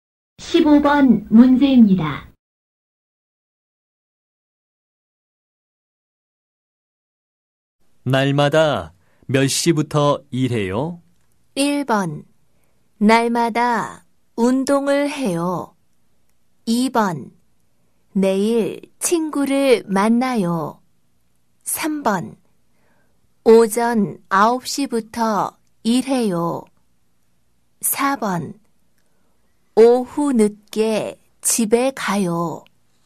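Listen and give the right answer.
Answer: 3: 오전 9시부터 일해요.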